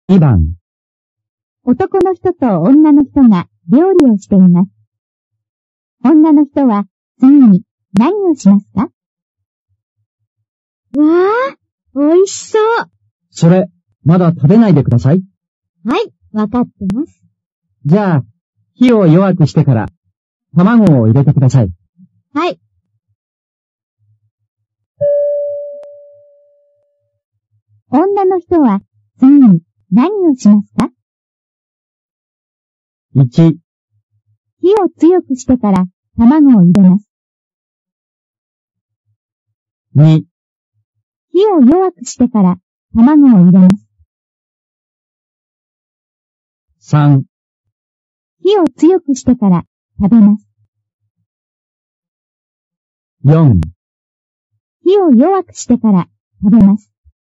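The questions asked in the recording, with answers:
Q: 女の人は次に何をしますか?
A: 2: 火を弱くしてから卵を入れます。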